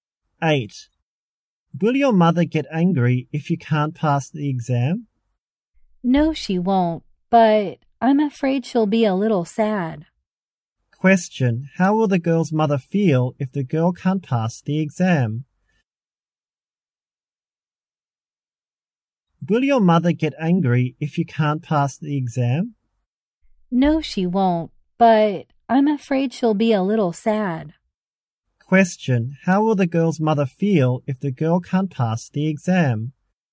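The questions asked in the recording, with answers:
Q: Question, how will the girl's mother feel if the girl can't pass the exam?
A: A little sad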